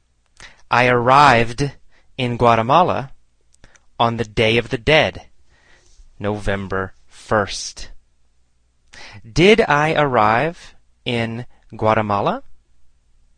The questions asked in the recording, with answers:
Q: Did I arrive in Guatemala?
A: Yes, I arrived in Guatemala.